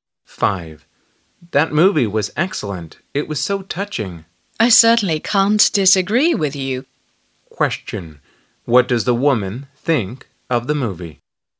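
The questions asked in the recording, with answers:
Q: what does the woman...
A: She also thinks the movie was excellent and touching.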